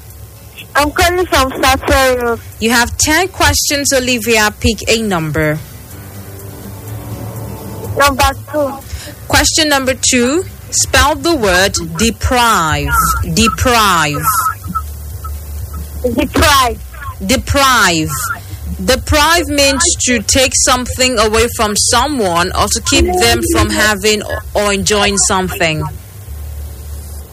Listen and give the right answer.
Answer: Deprive is currently spelled as D-E-P-R-I-V-E.